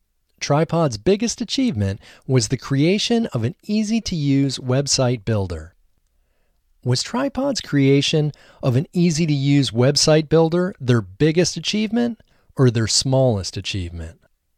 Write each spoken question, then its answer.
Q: Was Tripod's creation of an easy-to-use website builder their biggest achievement or their smallest achievement?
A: Tripod's creation of an easy-to-use website builder was their biggest achievement.